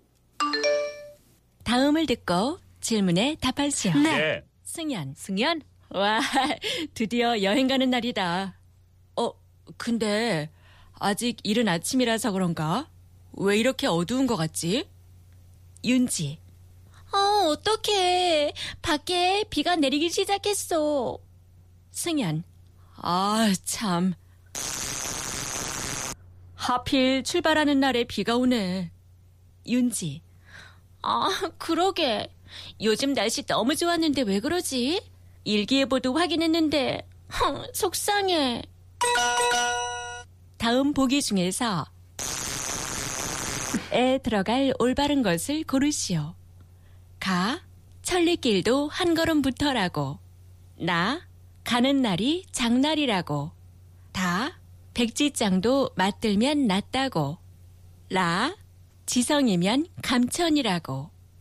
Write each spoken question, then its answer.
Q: 다음 보기 중에서 에 들어갈 올바른 것을 고르시오.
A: 나 가는 날이 장날이라고.